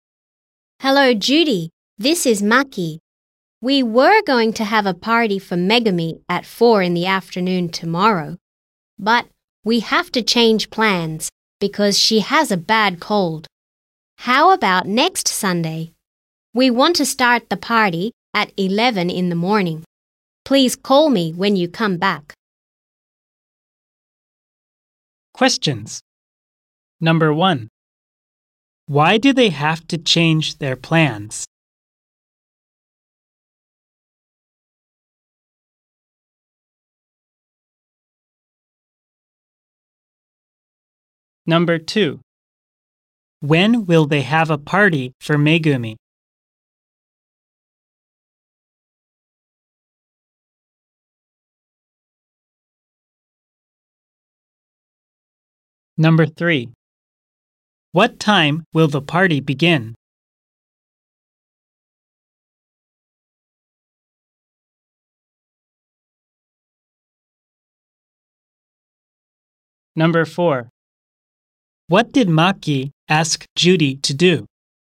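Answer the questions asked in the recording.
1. Because Megumi has a bad cold
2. Next Sunday
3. At 11 in the morning
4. To call her when she comes back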